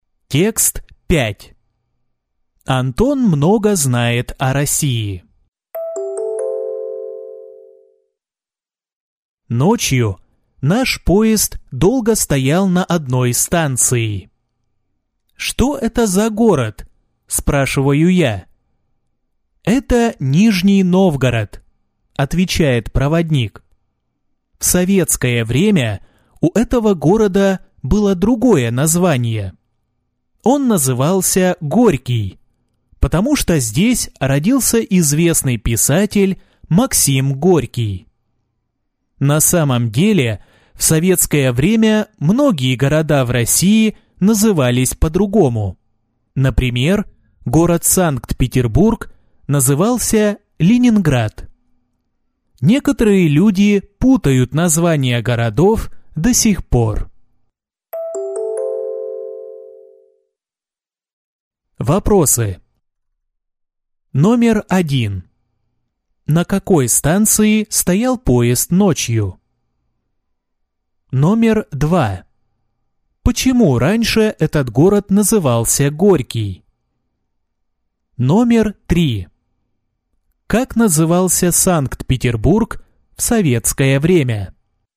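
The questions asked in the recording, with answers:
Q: На какой станции стоял поезд ночью?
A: Нижний Новгород

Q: Почему раньше этот город назывался Горький?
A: Потому что здесь родился писатель Максим Горький

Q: Как назывался Санкт-Петербург в советское время?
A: Ленинград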